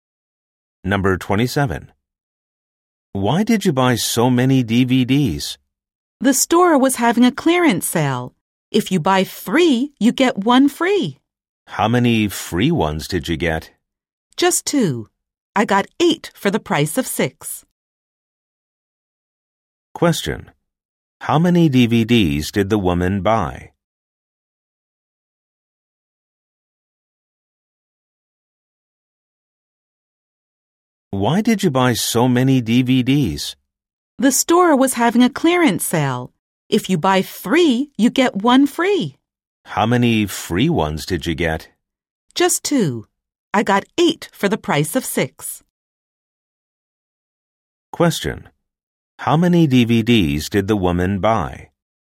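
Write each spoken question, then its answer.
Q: How many DVDs did the woman buy?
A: Eight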